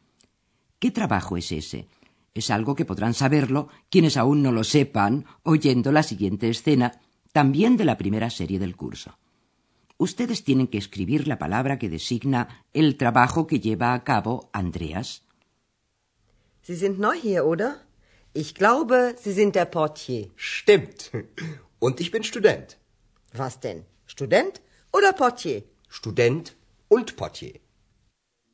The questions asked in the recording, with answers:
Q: Ustedes tienen que escribir la palabra que designa el trabajo que lleva a cabo Andreas.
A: Andreas se gana la vida como portier, como recepcionista.